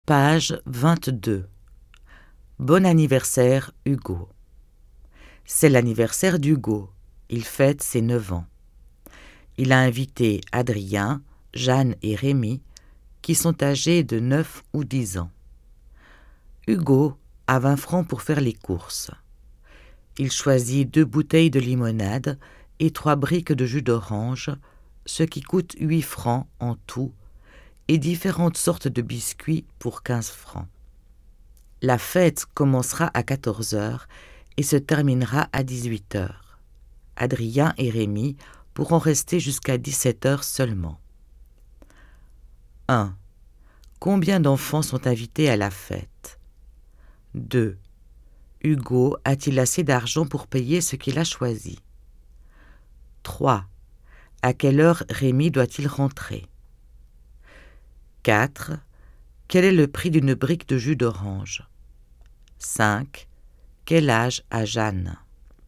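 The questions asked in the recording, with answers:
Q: Combien d'enfants sont invités à la fête?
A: 3 enfants (Adrien, Jeanne et Rémi)

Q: Hugo a-t-il assez d'argent pour payer ce qu'il a choisi?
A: Non, il faut 23 francs et il n'en a que 20

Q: À quelle heure Rémi doit-il rentrer?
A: À 17 heures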